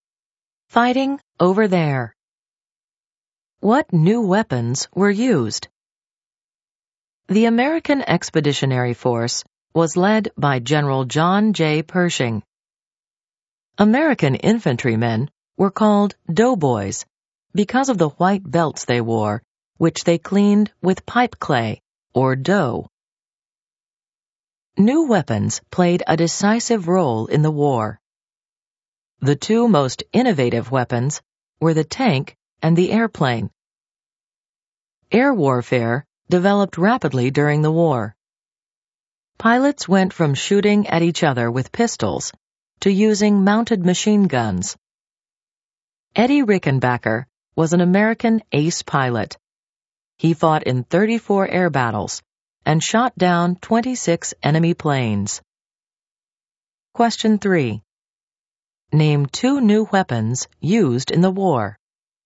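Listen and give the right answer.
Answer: The tank and the airplane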